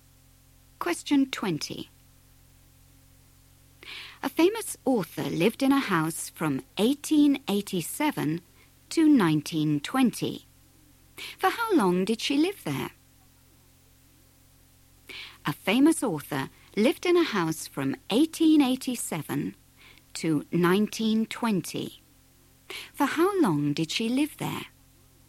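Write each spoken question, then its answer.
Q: For how long did she live there?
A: 33 years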